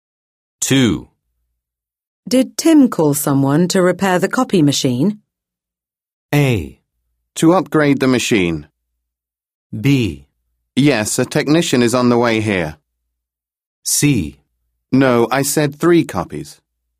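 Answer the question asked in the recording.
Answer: B: Yes, a technician is on the way here.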